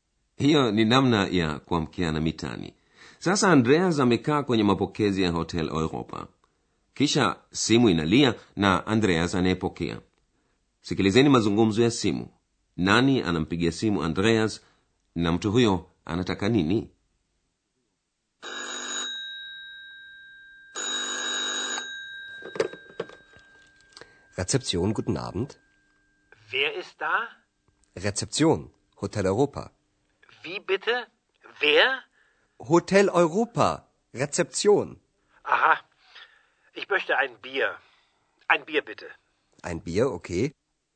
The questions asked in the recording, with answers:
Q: mtu huyo anataka nini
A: Mpigaji simu anamwomba Andreas amletee bia.